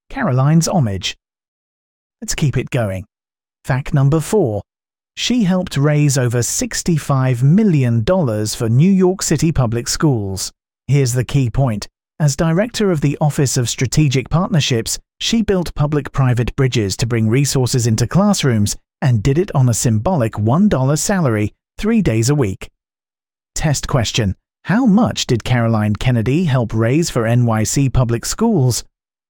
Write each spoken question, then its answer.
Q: How much did Caroline Kennedy help raise for NYC public schools?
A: Correct answer. Over $65 million.